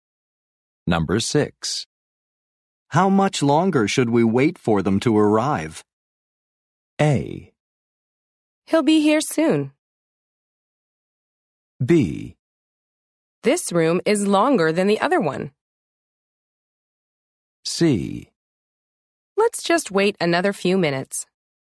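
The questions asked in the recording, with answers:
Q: How much longer should we wait for them to arrive?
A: C: Let's just wait another few minutes.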